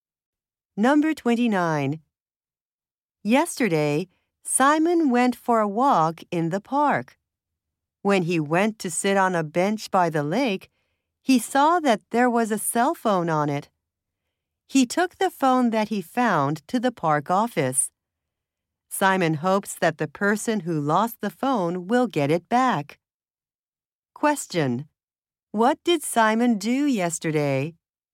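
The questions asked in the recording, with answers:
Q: What did Simon do yesterday?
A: He took a phone he found to the park office.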